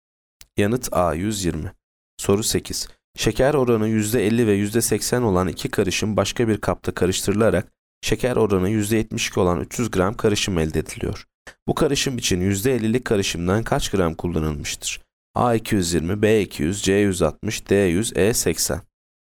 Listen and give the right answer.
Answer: Yanıt E 80.